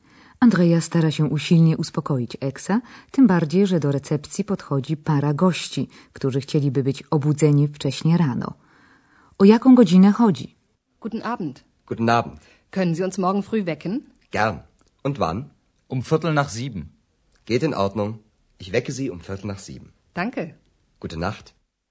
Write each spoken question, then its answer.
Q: O jaką godzinę chodzi?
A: Małżeństwo życzy sobie budzenie około siódmej, a konkretnie kwadrans po siódmej.